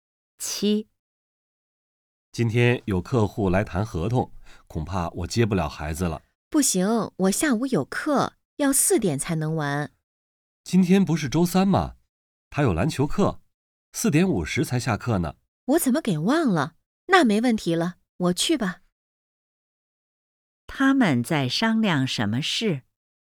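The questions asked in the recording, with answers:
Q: 他们在商量什么事?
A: 谁去接孩子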